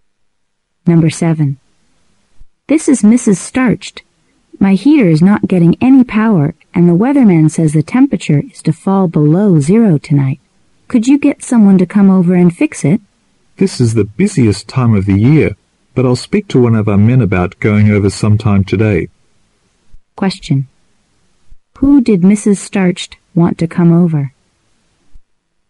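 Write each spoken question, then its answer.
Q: Who did Mrs. Starched want to come over?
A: A repairman to fix her heater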